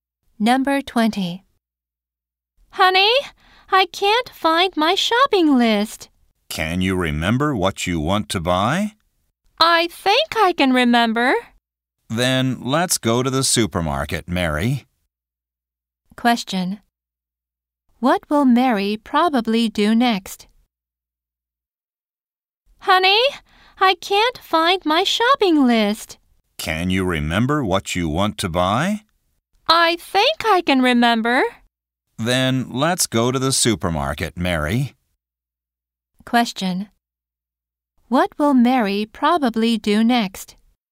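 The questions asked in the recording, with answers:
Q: What will Mary probably do next?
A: Go to the supermarket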